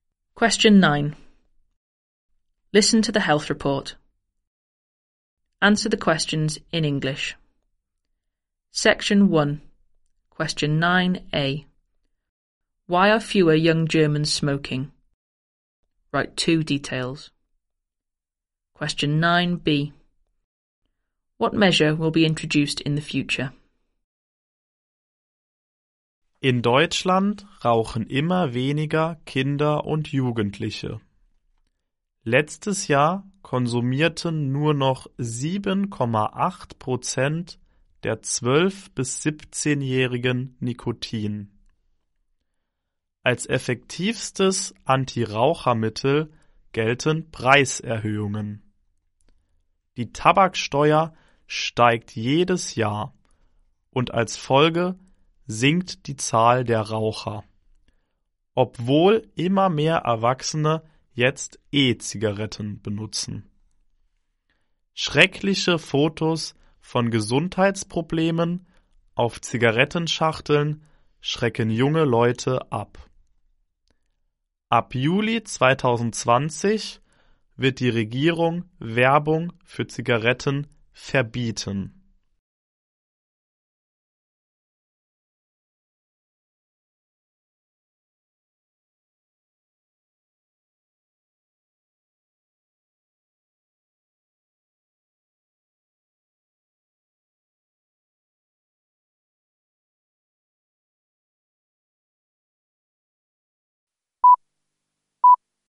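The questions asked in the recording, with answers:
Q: Why are fewer young Germans smoking?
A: Price rises/tobacco tax increases; horrible health photos on packets

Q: What measure will be introduced in the future?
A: A ban on cigarette advertising from July 2020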